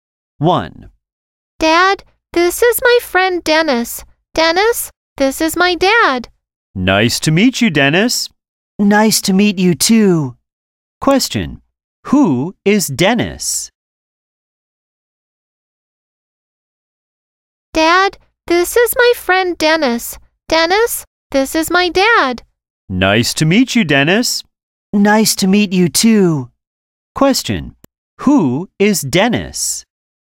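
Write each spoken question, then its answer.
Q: Who is Dennis?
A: The child's friend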